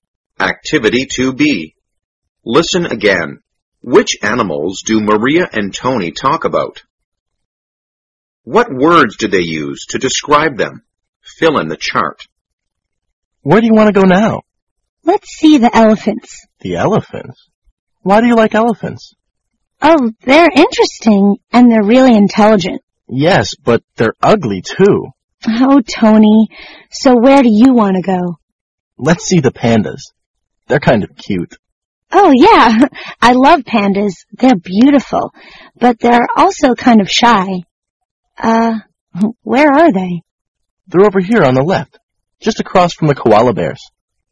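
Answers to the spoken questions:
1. Elephants and pandas
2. Elephants: interesting, intelligent, ugly; pandas: cute, beautiful, shy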